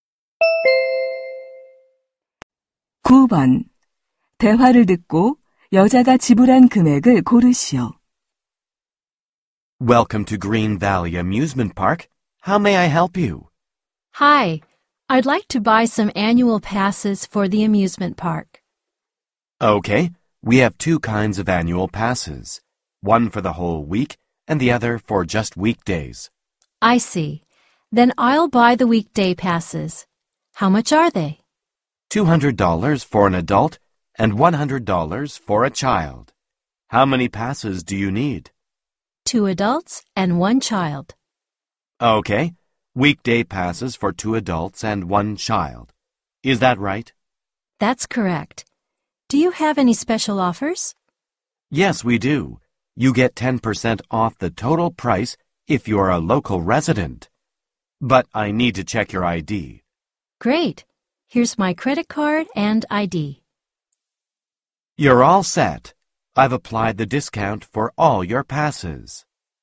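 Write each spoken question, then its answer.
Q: 대화를 듣고 여자가 지불한 금액을 고르시오.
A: $450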